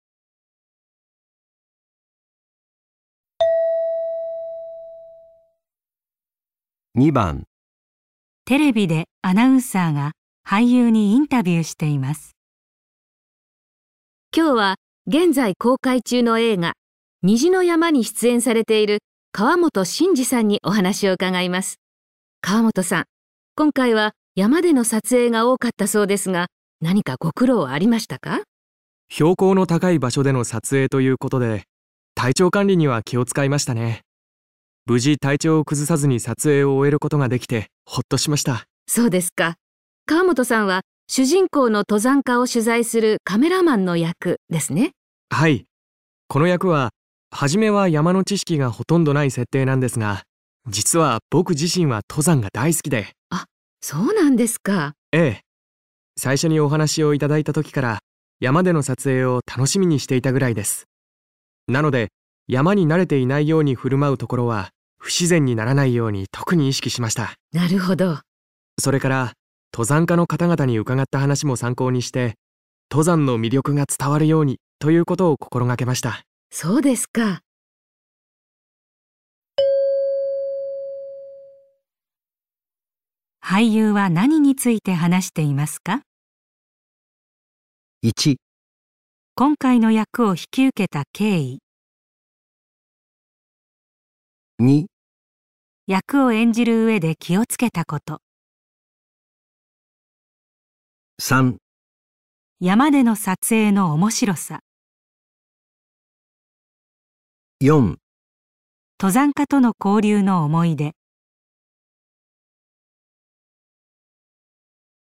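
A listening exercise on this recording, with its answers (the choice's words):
俳優は何について話していますか。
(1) 今回の役を引き受けた経緯。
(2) 役を演じる上で気をつけたこと。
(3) 山での撮影の面白さ。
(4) 登山家との交流の思い出。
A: 役を演じる上で気をつけたこと。

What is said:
女:そうですか。 河本さんは主人公の登山家を取材するカメラマンの役、 ですね?
男:はい。 この役は、始めは山の知識がほとんどない設定なんですが、 実は僕自身は登山が大好きで。
女:あっ、そうなんですか
男 : ええ。 最初にお話しをいただいた時から山での撮影を楽しみにしていたぐらいです。 なので、山に慣れてい ないように振る舞うところは不自然にならないように特に意識しました。

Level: 【N1 第1回】聴解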